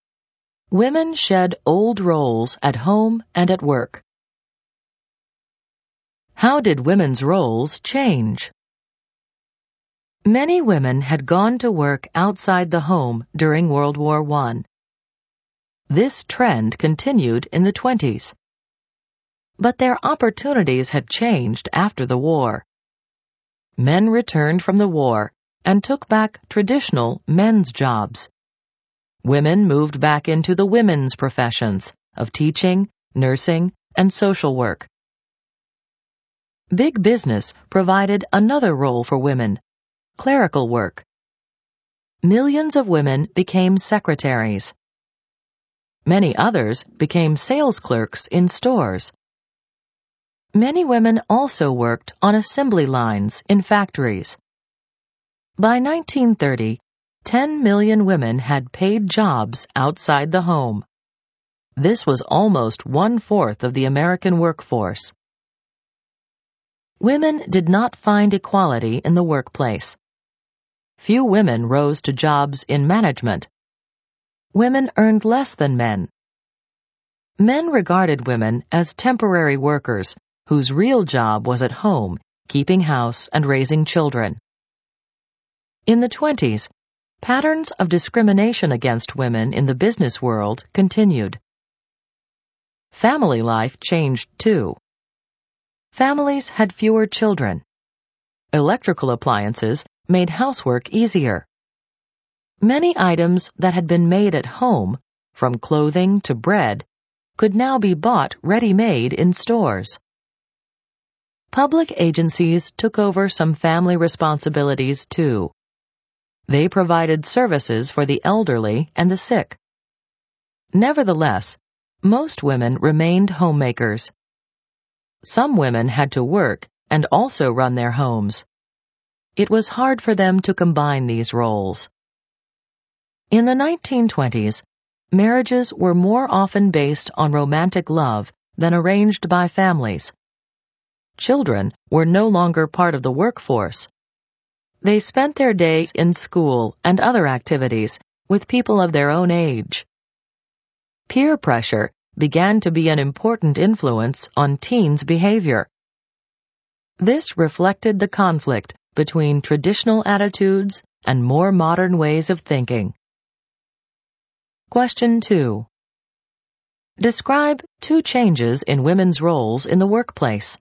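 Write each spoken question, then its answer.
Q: Describe two changes in women's roles in the workplace.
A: Women moved back into teaching, nursing and social work, and millions took clerical jobs as secretaries or sales clerks.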